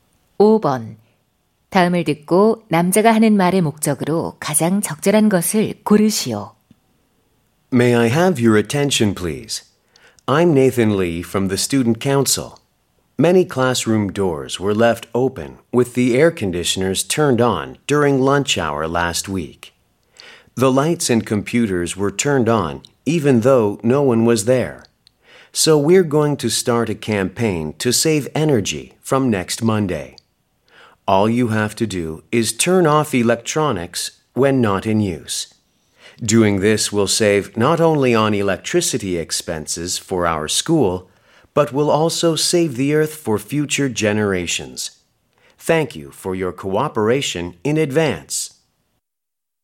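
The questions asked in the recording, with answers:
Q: 다음을 듣고 남자가 하는 말의 목적으로 가장 적절한 것을 고르시오.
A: 에너지 절약 캠페인 참여 독려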